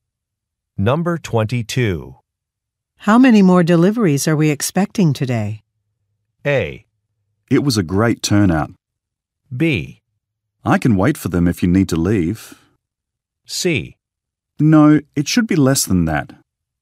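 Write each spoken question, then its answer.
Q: How many more deliveries are we expecting today?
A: B: I can wait for them if you need to leave.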